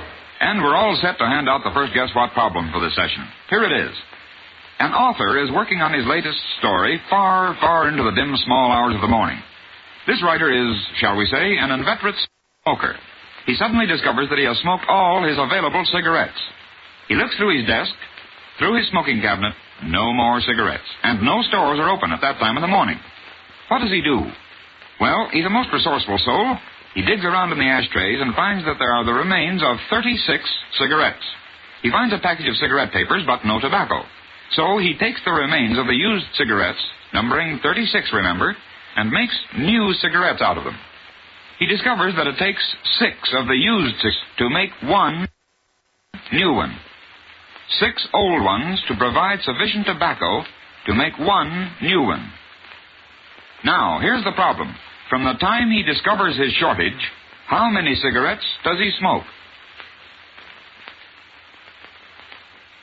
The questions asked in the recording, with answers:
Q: From the time he discovers his shortage, how many cigarettes does he smoke?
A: Seven.